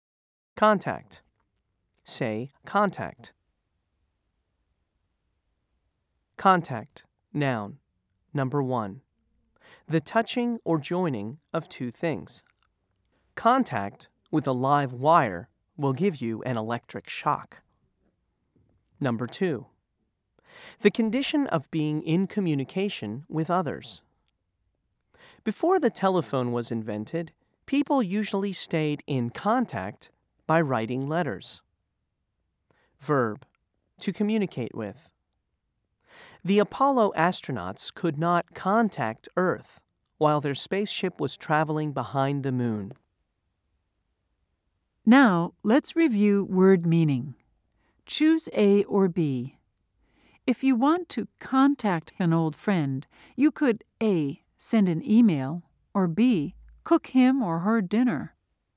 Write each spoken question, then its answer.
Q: Choose A or B. If you want to contact an old friend, you could A.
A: If you said A, you're correct.